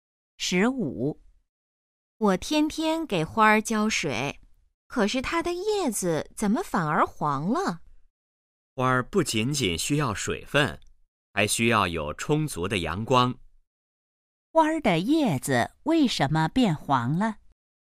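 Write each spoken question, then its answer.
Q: 花儿的叶子为什么变黄了?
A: 缺少阳光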